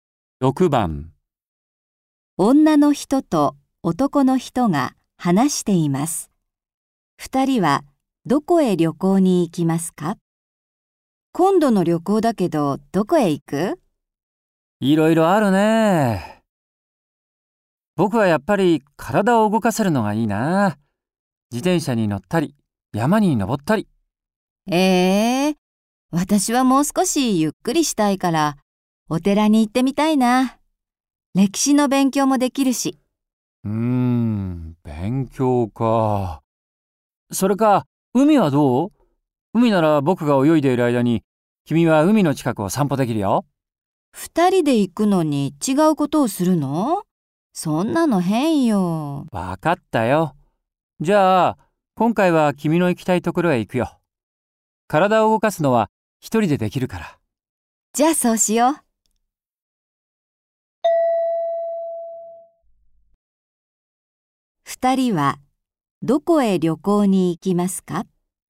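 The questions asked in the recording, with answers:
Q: 二人はどこへ旅行に行きますか?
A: お寺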